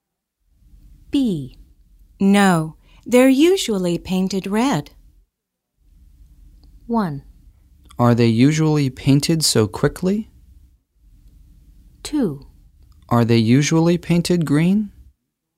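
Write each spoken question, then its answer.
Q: No, they're usually painted red.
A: 2: Are they usually painted green?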